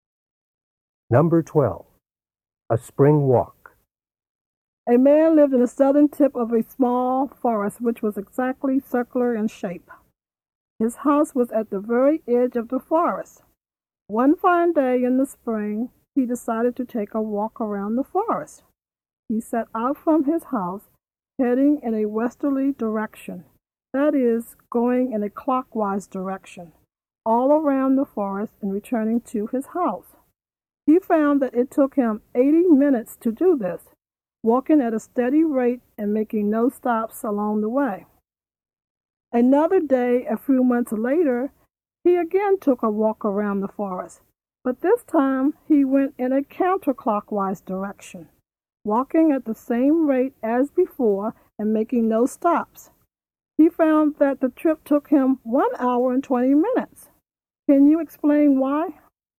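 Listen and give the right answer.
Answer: 80 minutes is the same as 1 hour and 20 minutes, so both walks took the same time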